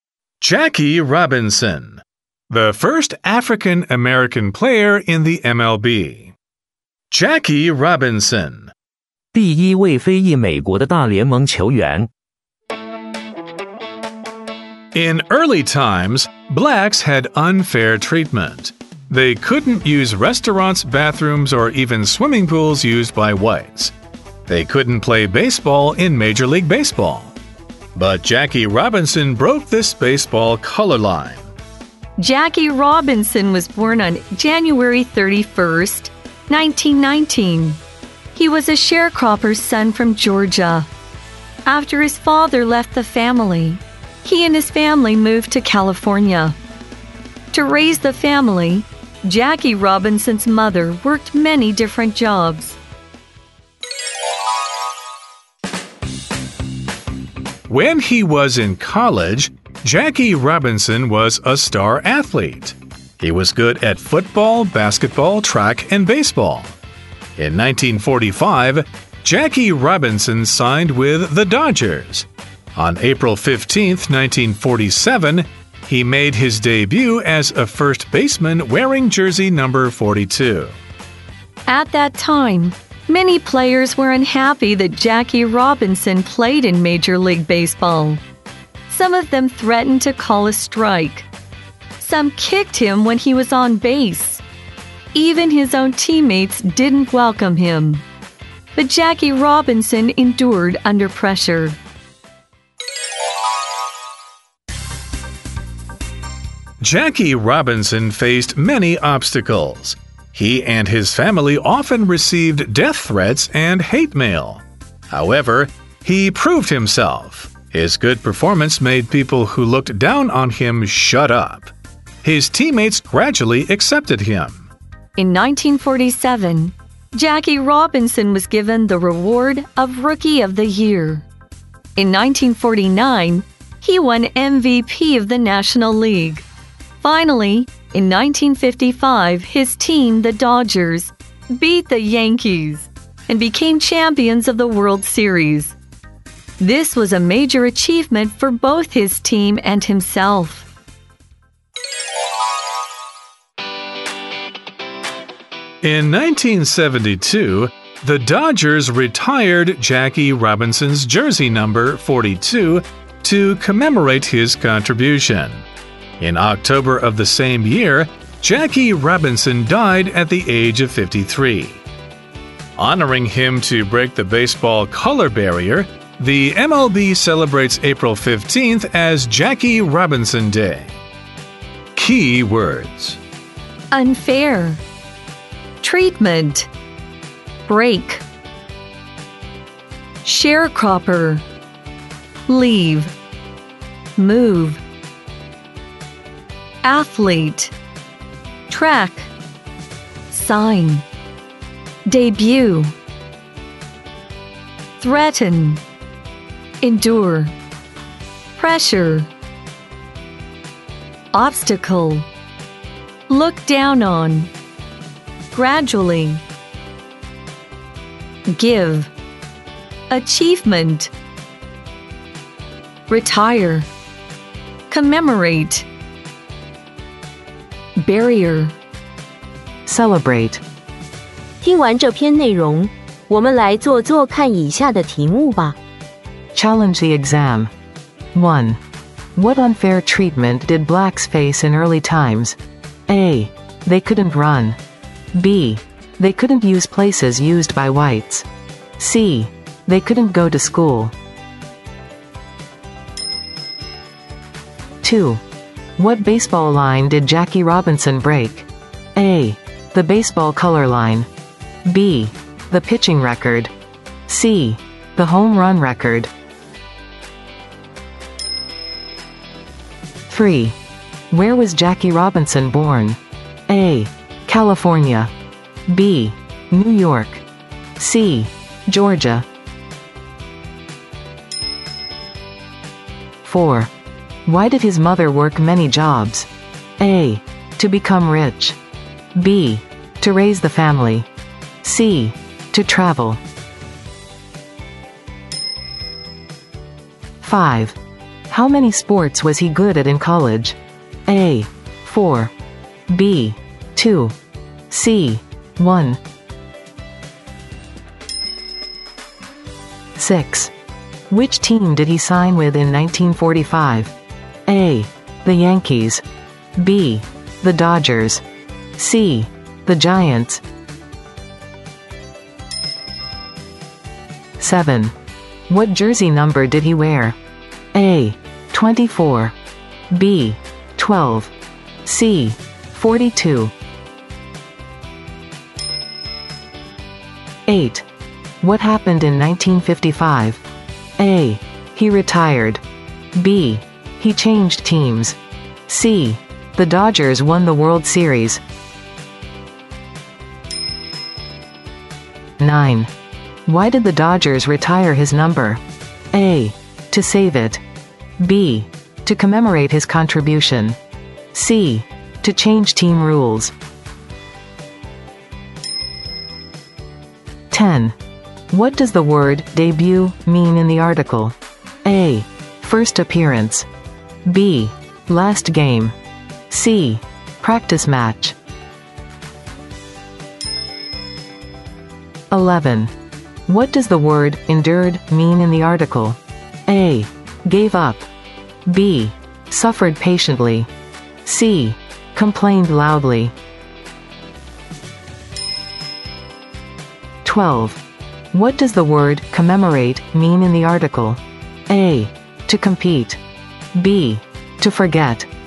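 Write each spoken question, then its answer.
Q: What unfair treatment did blacks face in early times?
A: B: They couldn't use places used by whites.

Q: What baseball line did Jackie Robinson break?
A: A: The baseball color line.

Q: Where was Jackie Robinson born?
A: C: Georgia.

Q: Why did his mother work many jobs?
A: B: To raise the family.

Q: How many sports was he good at in college?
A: A: 4.

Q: Which team did he sign with in 1945? A.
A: B: The Dodgers.

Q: What jersey number did he wear?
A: C: 42.

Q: What happened in 1955? A.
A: C: The Dodgers won the World Series.

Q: Why did the Dodgers retire his number?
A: B: To commemorate his contribution.

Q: What does the word debut mean in the article?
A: A: First appearance.

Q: What does the word endured mean in the article?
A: B: Suffered patiently.

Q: What does the word commemorate mean in the article?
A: C: To remember and honor.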